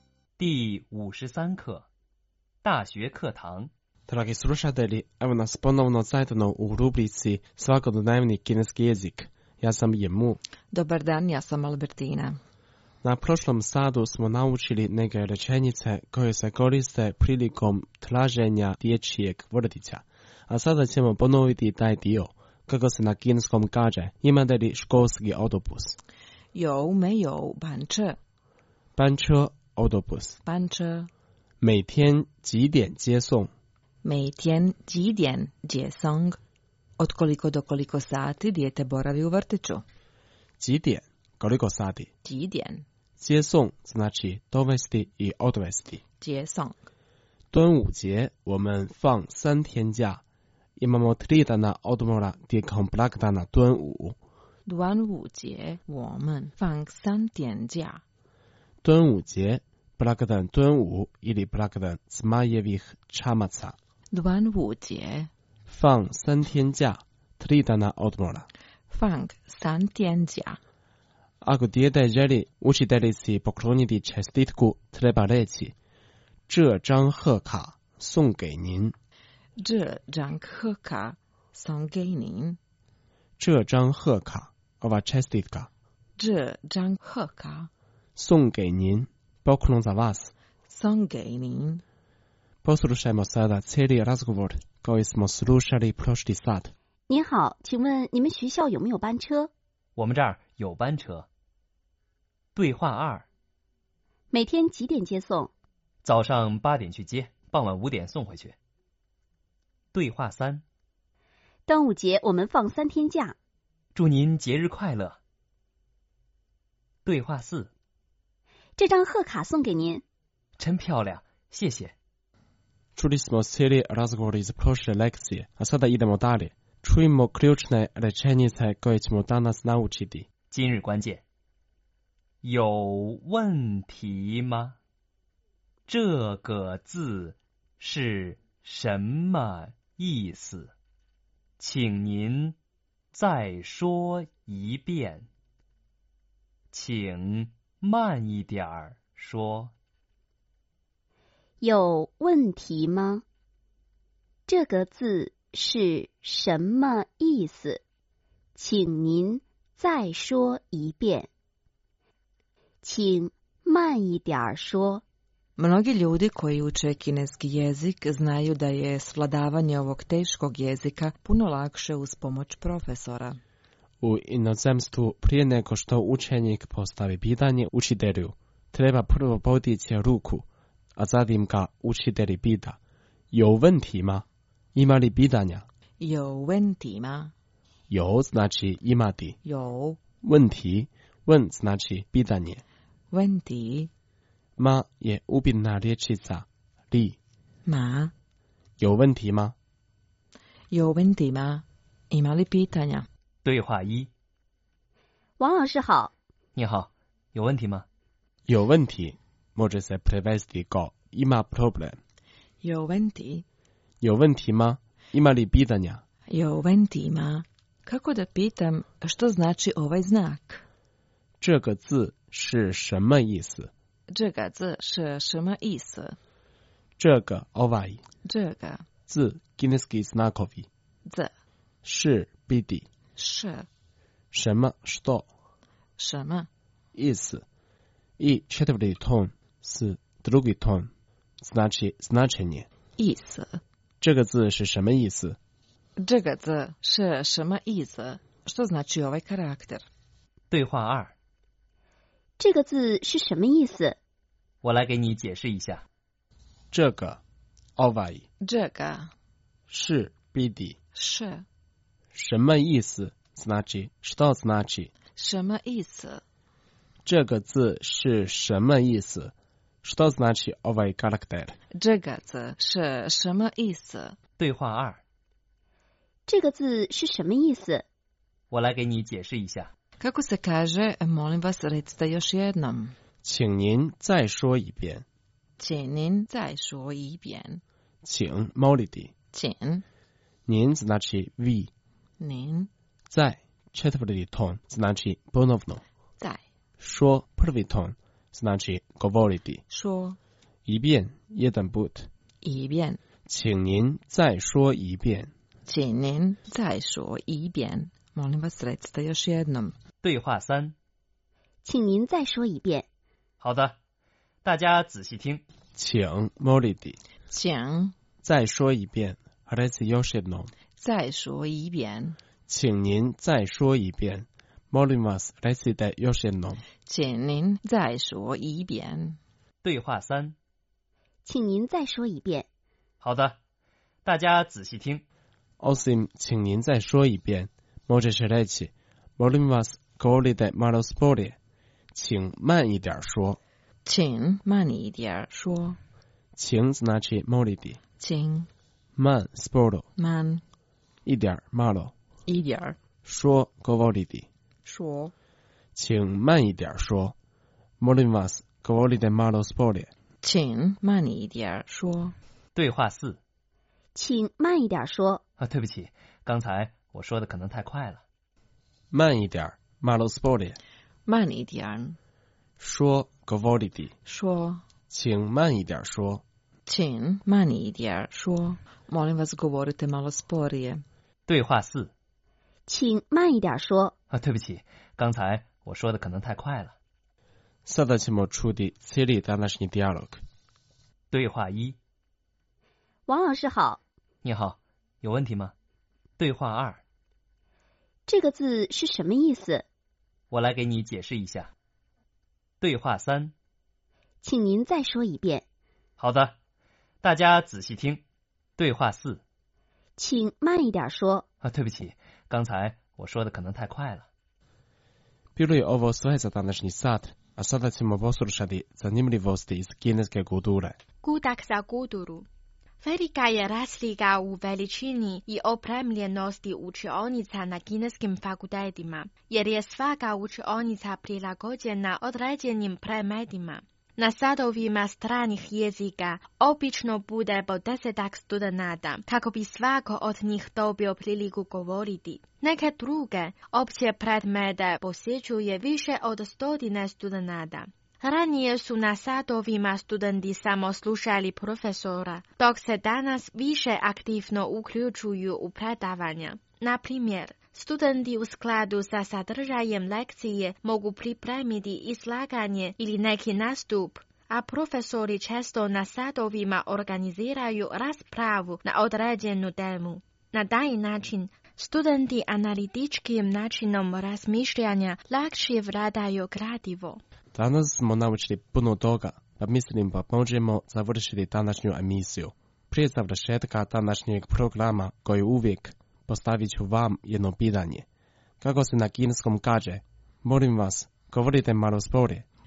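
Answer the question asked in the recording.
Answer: 请慢一点说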